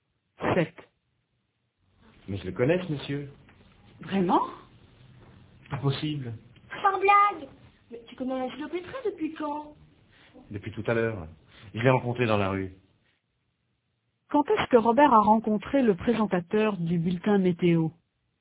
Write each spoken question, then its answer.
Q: Quand est-ce que Robert a rencontré le présentateur du bulletin météo?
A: Tout à l'heure.